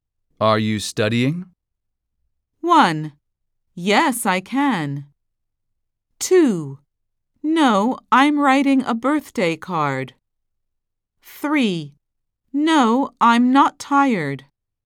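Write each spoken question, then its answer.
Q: Are you studying?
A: 2: No, I'm writing a birthday card.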